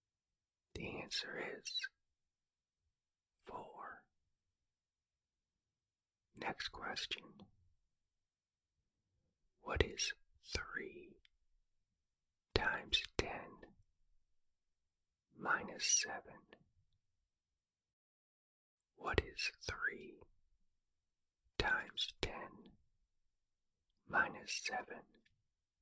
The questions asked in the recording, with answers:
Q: What is 3 times 10 minus 7?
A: The answer is 23.